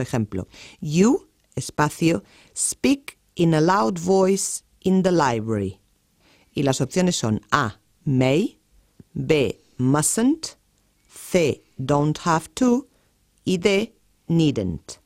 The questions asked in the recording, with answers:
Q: you, espacio, speak in a loud voice in the library.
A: La respuesta correcta sería la B, you mustn't speak in a loud voice in the library